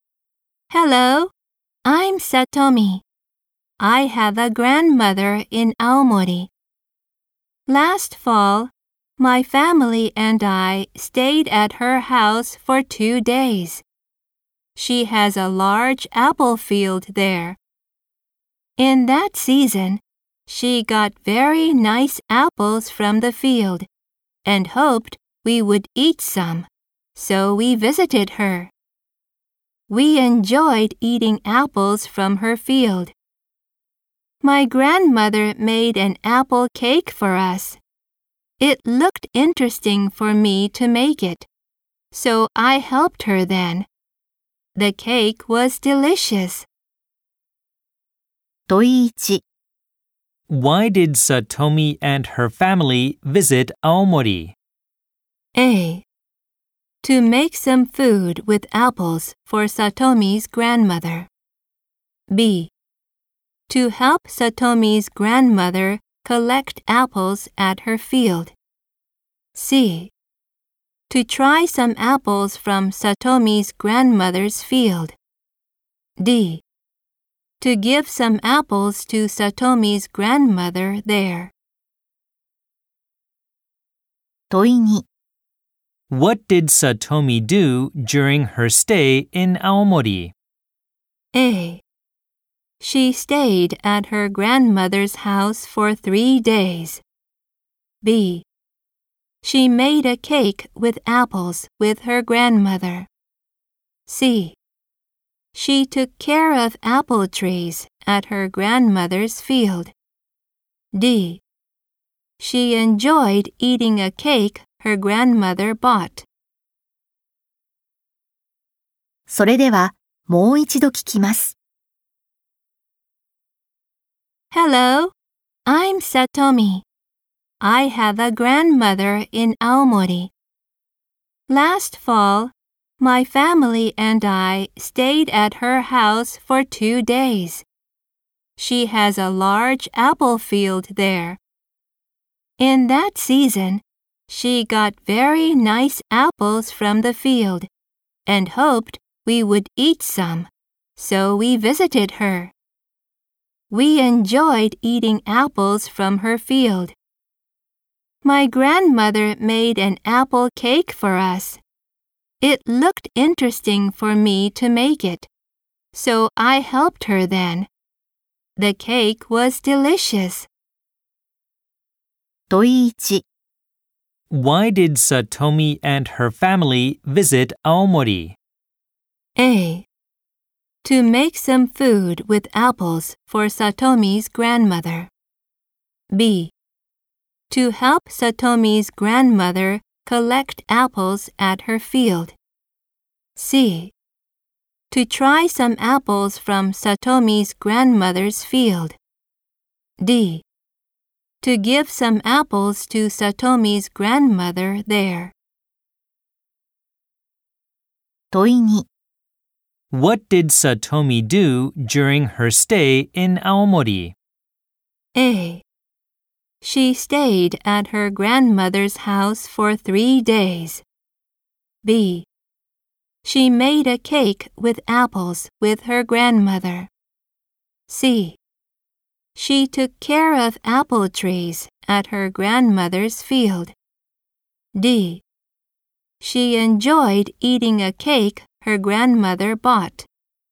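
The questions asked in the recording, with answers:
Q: Why did Satomi and her family visit Aomori?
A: C: To try some apples from Satomi's grandmother's field.

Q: What did Satomi do during her stay in Aomori?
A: B: She made a cake with apples with her grandmother.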